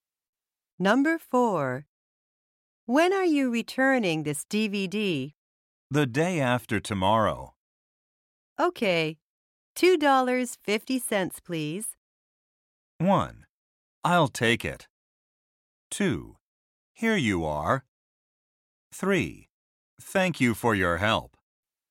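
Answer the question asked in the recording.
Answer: 2: Here you are.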